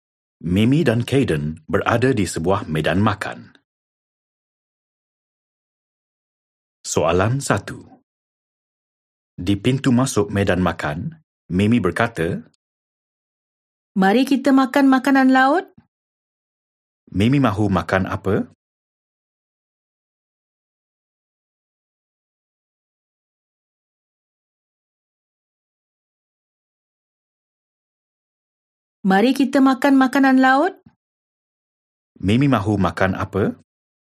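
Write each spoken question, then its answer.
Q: Mimi mahu makan apa?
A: makanan laut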